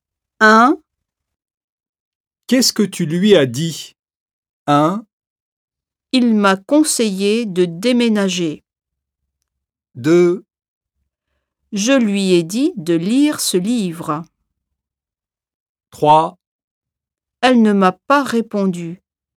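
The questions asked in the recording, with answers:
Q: Qu'est-ce que tu lui as dit?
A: 2: Je lui ai dit de lire ce livre.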